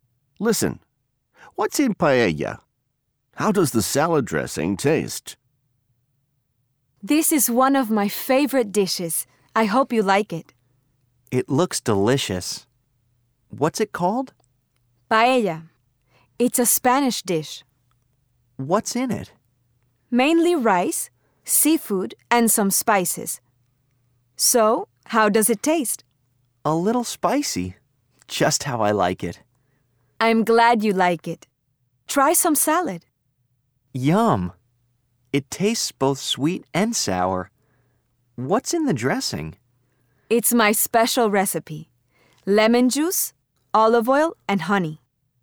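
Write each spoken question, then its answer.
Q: What's in paella?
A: Mainly rice, seafood, and some spices

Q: How does the salad dressing taste?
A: Both sweet and sour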